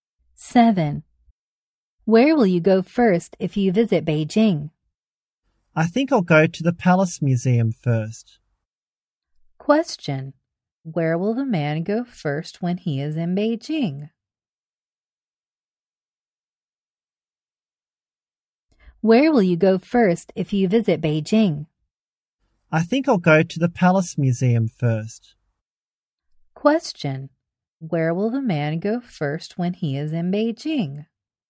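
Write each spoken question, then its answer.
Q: Question, where will the man go first when he is in Beijing?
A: The Palace Museum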